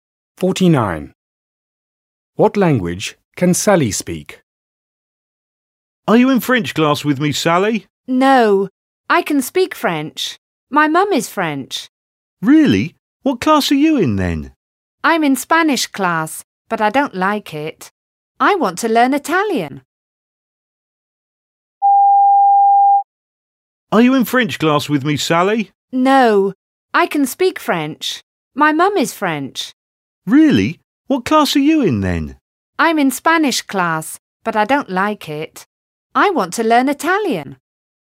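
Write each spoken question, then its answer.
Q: What language can Sally speak?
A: French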